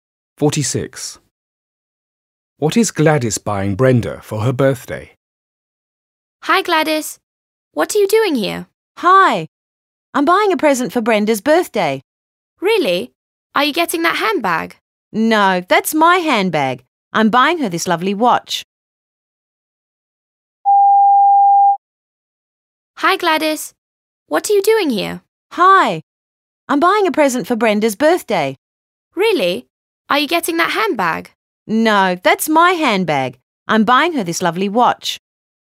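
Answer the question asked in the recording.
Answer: a watch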